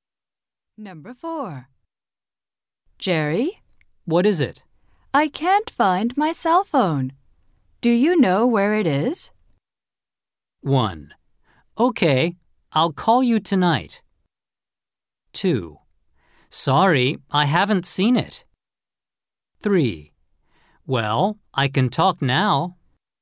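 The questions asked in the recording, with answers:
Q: Do you know where it is?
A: 2: Sorry, I haven't seen it.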